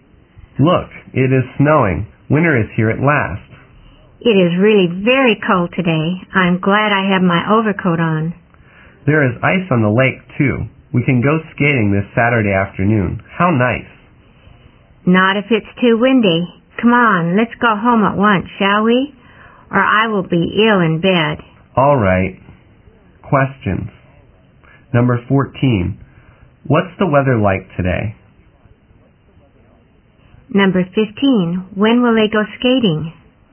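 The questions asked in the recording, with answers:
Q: What's the weather like today?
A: It is snowing and very cold.

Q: When will they go skating?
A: This Saturday afternoon.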